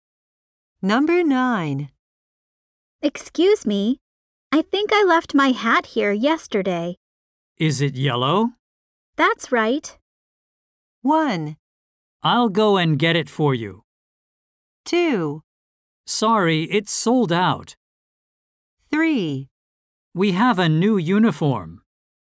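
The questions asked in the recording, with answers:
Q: That's right.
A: 1: I'll go and get it for you.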